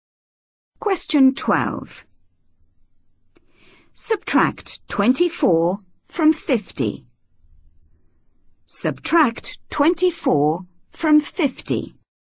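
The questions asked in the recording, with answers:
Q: Subtract 24 from 50.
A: 26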